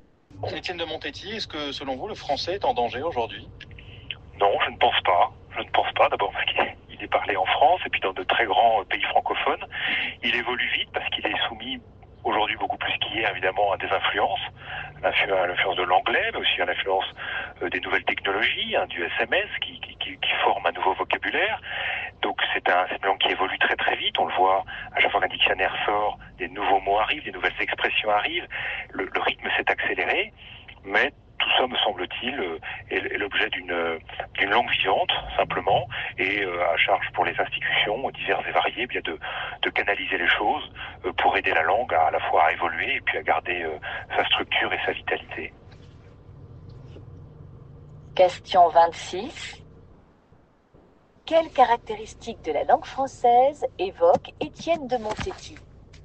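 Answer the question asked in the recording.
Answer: Elle n'est pas en danger : c'est une langue vivante qui évolue très vite, sous l'influence de l'anglais et des nouvelles technologies (SMS).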